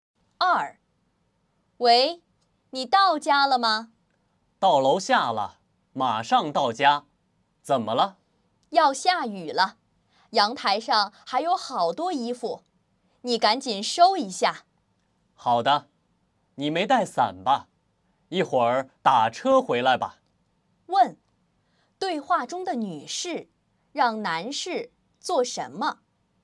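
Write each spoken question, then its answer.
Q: 对话中的女士让男士做什么?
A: 把阳台上的衣服收一下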